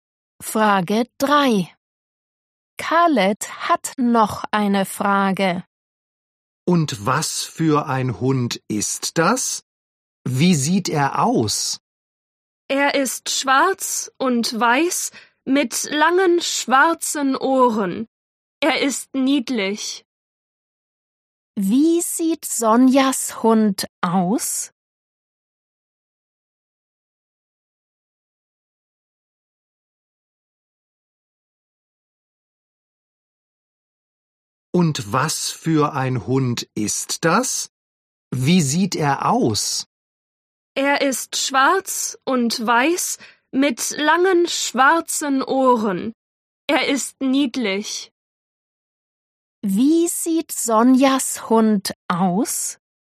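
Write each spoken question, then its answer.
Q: Wie sieht Sonjas Hund aus?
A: schwarz und weiß mit langen schwarzen Ohren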